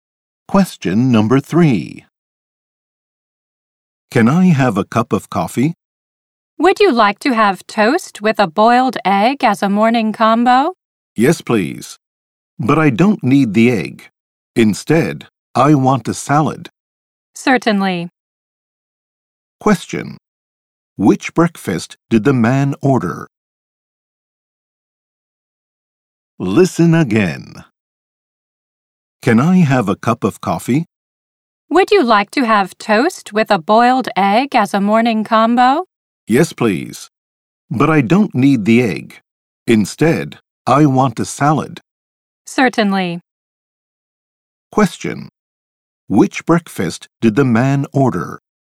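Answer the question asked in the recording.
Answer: Coffee, toast and a salad (no egg)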